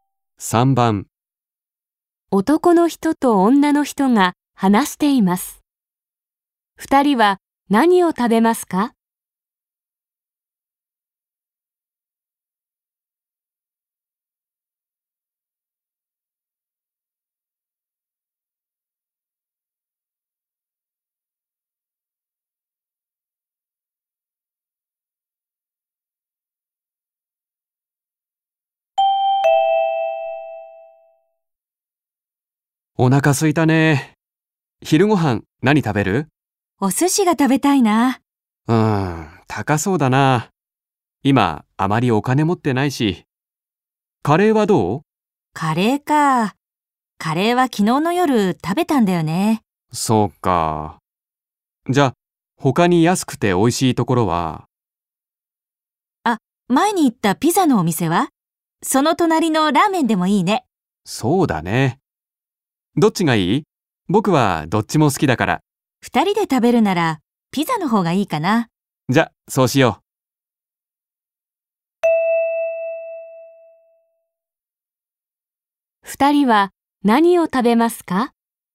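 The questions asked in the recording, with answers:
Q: 二人は何を食べますか?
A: ピザ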